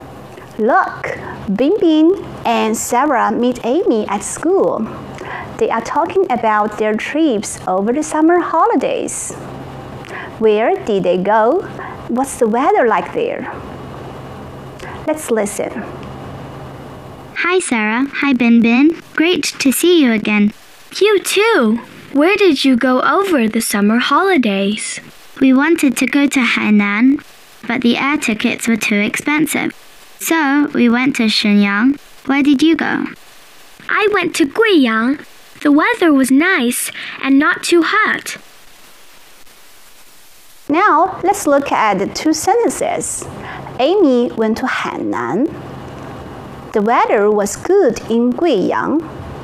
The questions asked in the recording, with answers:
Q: Amy went to Hainan.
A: It's false. Amy didn't go to Hainan.

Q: The weather was good in Guiyang.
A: It's true.